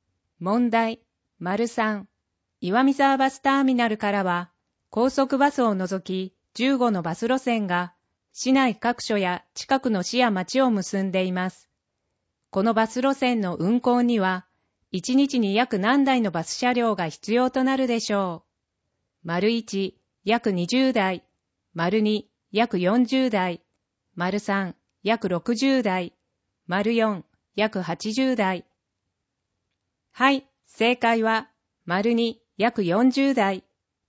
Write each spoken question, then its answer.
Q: このバス路線の運行には、1日に約何台のバス車両が必要となるでしょう。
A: 正解は、丸に約40台